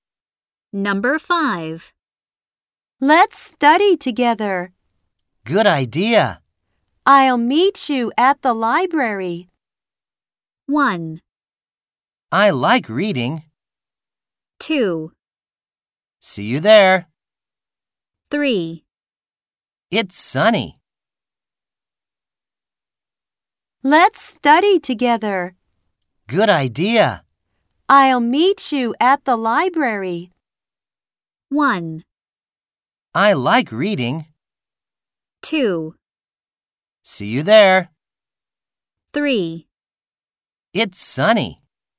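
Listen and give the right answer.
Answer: 2: See you there.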